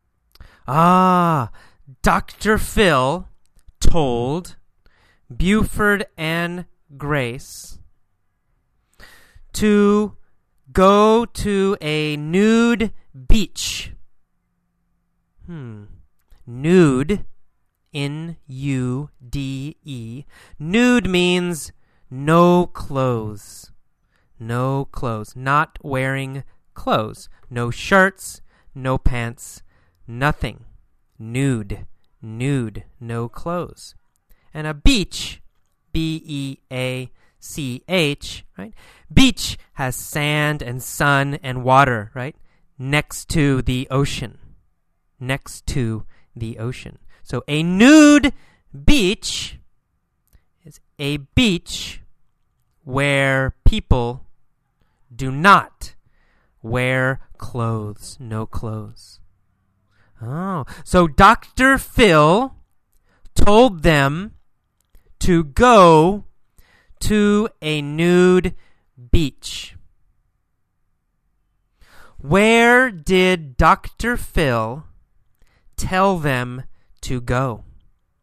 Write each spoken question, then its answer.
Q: Where did Dr. Phil tell them to go?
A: He told them to go to a nude beach.